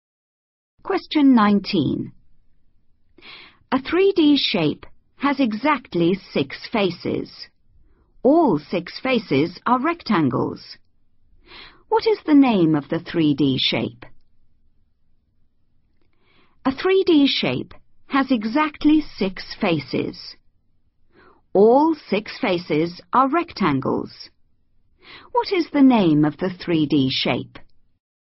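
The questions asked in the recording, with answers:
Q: What is the name of the 3D shape?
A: cuboid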